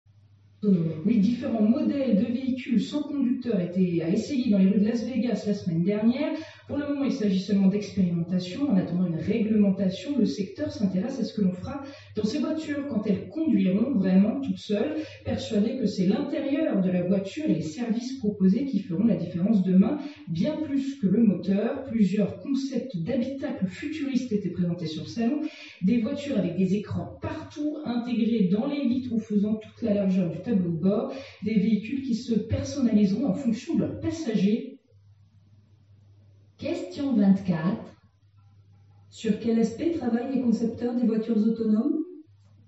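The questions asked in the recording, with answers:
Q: Sur quel aspect travaillent les concepteurs des voitures autonomes ?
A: L'intérieur de la voiture (l'habitacle) et les services proposés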